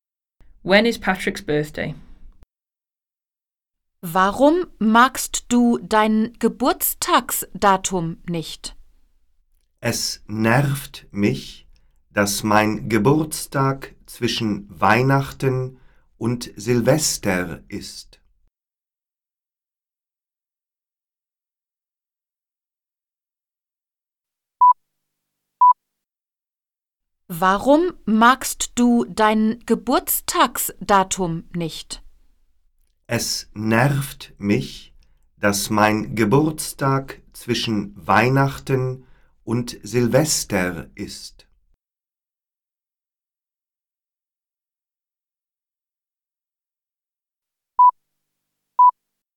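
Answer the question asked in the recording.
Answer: Between Christmas and New Year's Eve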